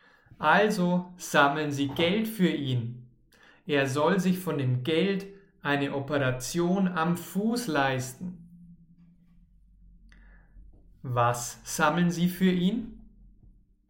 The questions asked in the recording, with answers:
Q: Was sammeln sie für ihn?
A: Geld. Sie sammeln Geld für ihn.